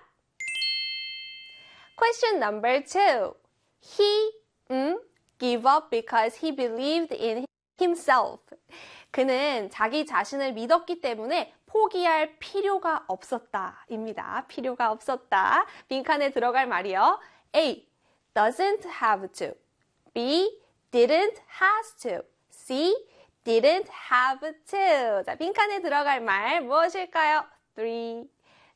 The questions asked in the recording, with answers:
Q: He give up because he believed in himself. 그는 자기 자신을 믿었기 때문에 포기할 필요가 없었다. 입니다. 필요가 없었다. 빈칸에 들어갈 말이요. A. doesn't have to. B. didn't has to. C. didn't have to.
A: 그렇습니다. C에 didn't have to를 찾아주시면 되죠.